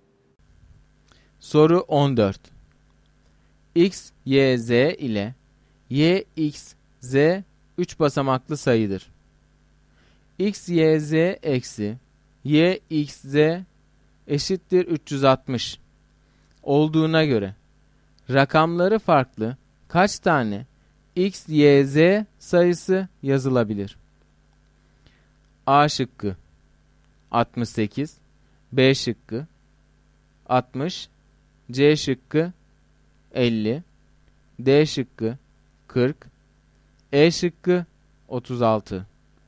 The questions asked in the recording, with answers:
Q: X, Y, Z eksi Y, X, Z eşittir 360 olduğuna göre rakamları farklı kaç tane X, Y, Z sayısı yazılabilir?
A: Doğru cevap D şıkkı.